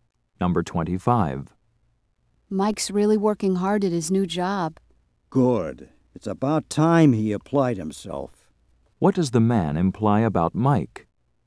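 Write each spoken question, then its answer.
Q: What does the man imply about Mike?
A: Mike didn't work hard before.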